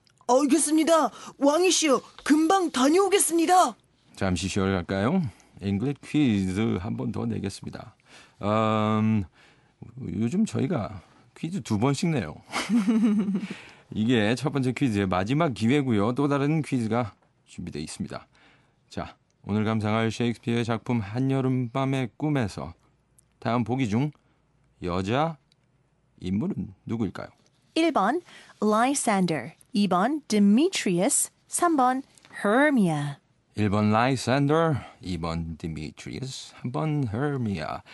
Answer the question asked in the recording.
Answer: 그래서 3번 헤르미아가 정답이었죠.